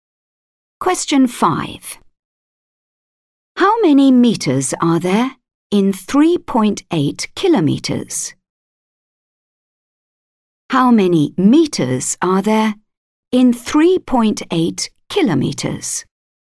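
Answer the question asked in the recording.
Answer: 3800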